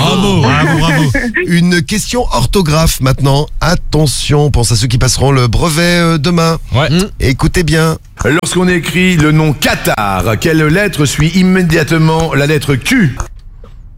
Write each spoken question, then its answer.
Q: Lorsqu'on écrit le nom Qatar, quelle lettre suit immédiatement la lettre Q?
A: c'est un A, c'est Q A T A R